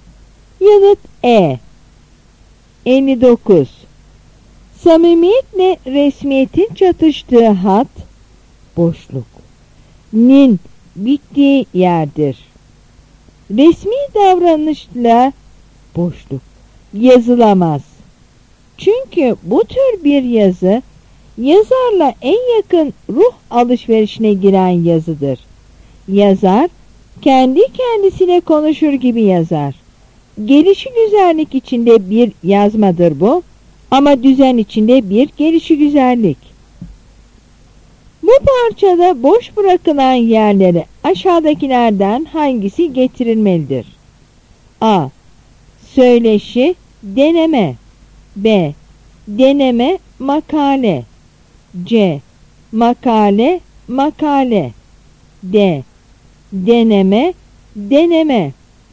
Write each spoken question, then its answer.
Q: Bu parçada boş bırakılan yerlere aşağıdakilerden hangisi getirilmelidir?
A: Yanıt D.